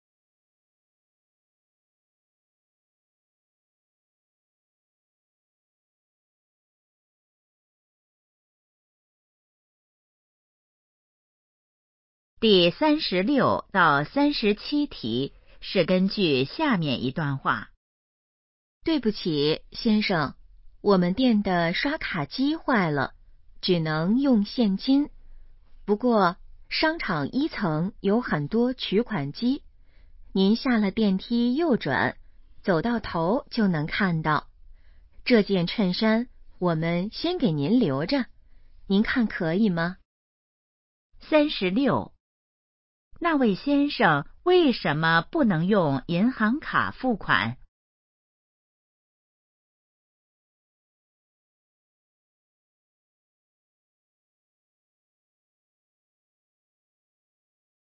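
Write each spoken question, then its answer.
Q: 那位先生为什么不能用银行卡付款?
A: 刷卡机坏了

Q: 哪里有取款机?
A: 商场1层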